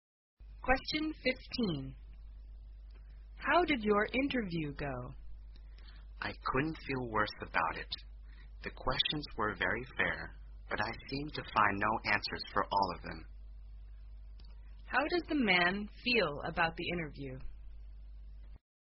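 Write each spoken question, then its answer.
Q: How does the man feel about the interview?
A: Very bad; he couldn't answer the questions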